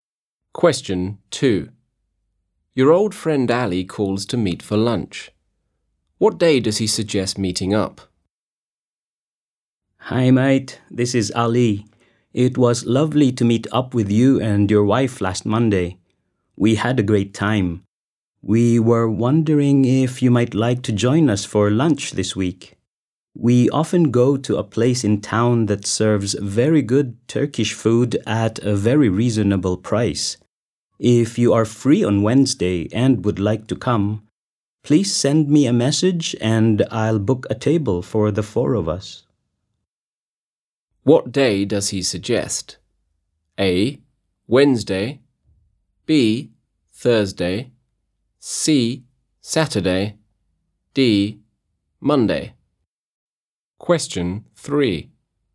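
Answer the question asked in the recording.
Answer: A: Wednesday.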